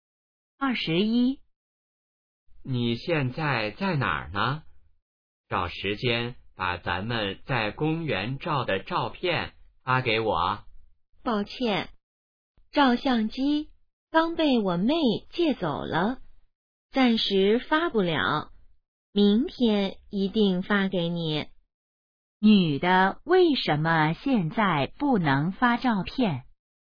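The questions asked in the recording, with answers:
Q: 女的为什么现在不能发照片?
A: 照相机被妹妹借走了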